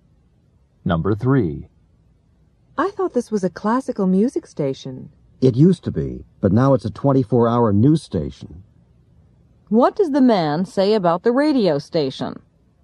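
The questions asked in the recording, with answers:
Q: What does the man say about the radio station?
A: It used to play classical music but is now a 24-hour news station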